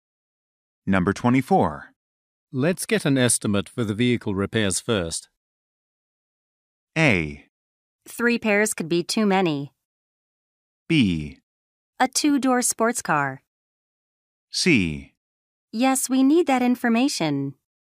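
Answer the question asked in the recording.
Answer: C: Yes, we need that information.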